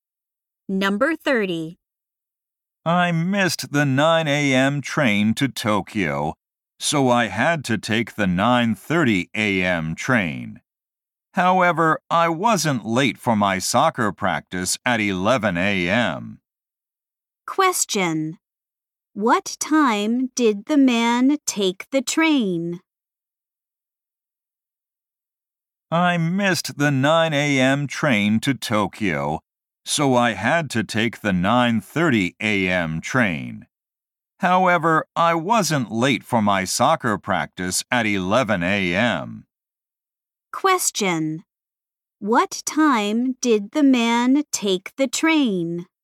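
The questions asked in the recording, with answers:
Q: What time did the man take the train?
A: 9:30 a.m.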